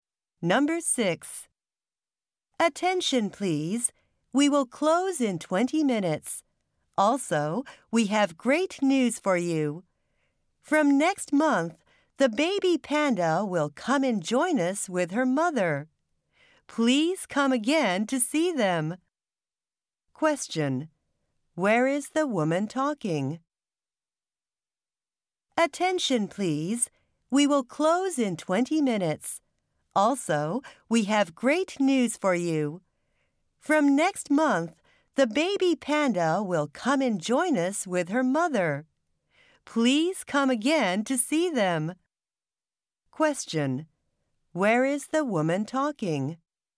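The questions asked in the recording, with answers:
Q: Where is the woman talking?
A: At a zoo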